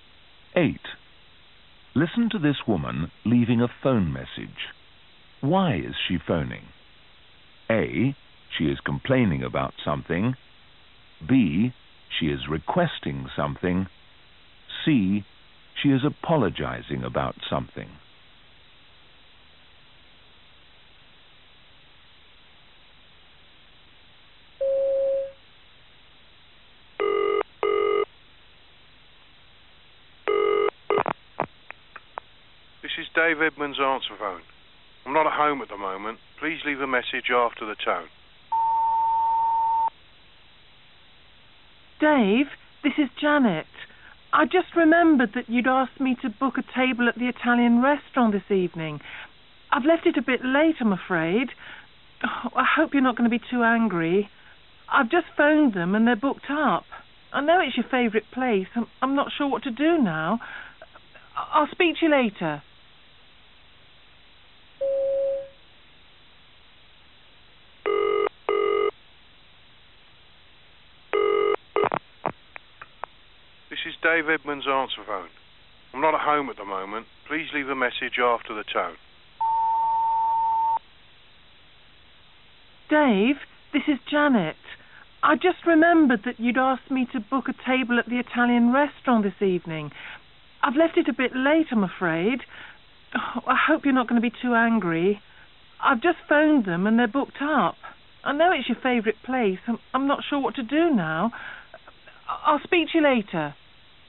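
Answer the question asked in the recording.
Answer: C: She is apologizing about something.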